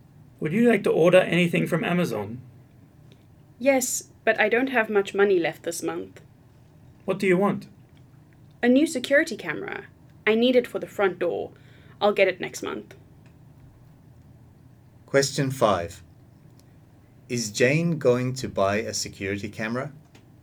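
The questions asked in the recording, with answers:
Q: Is Jane going to buy a security camera?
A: Yes, next month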